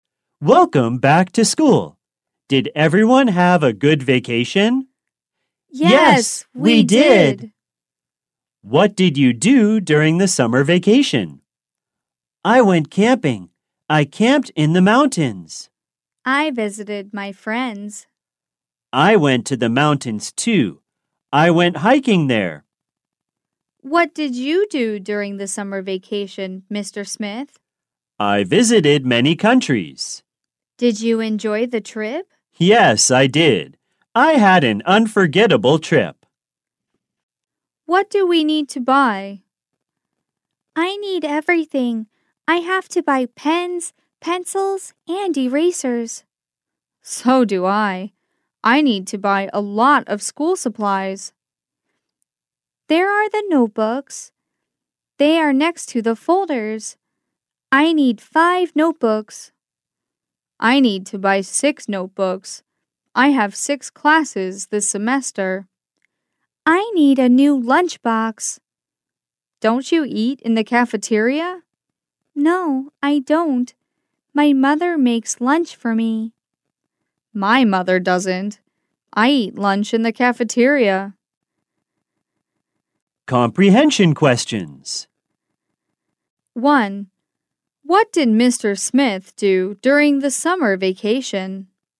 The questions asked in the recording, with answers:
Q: What did Mr. Smith do during the summer vacation?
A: He visited many countries during the summer vacation.